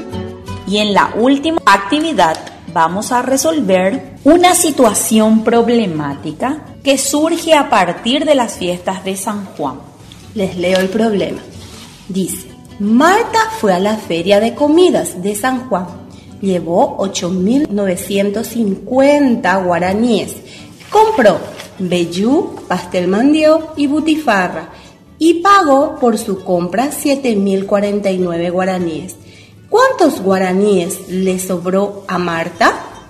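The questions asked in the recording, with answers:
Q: ¿cuántos guaraníes le sobró a Marta?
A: 1.901 guaraníes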